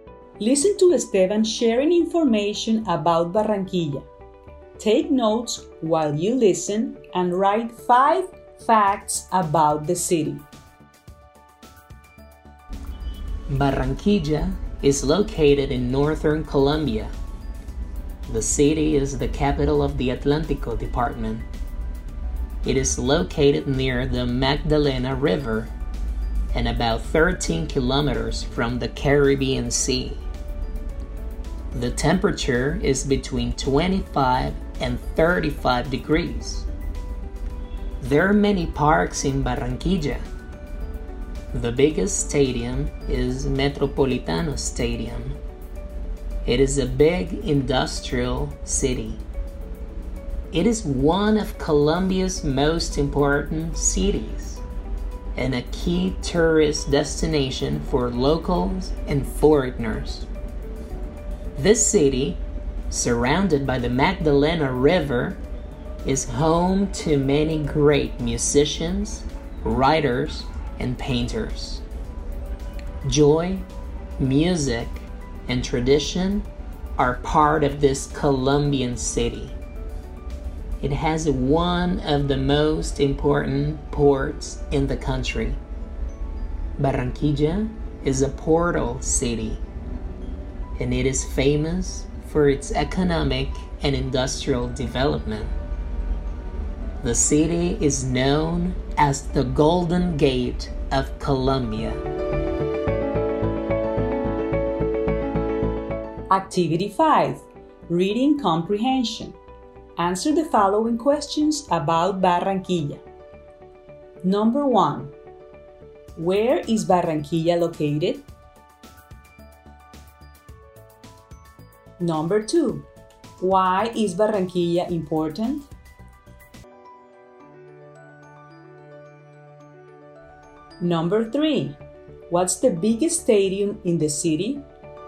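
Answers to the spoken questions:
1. In northern Colombia
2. It is a big industrial city, a key tourist destination and has one of the most important ports in the country
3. Metropolitano Stadium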